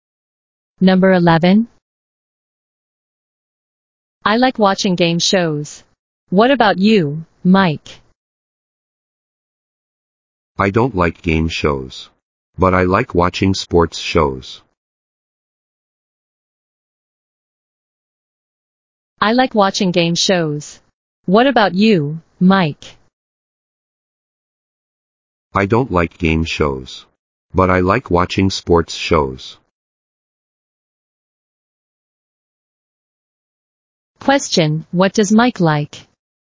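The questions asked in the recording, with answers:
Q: Question, what does Mike like?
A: Sports shows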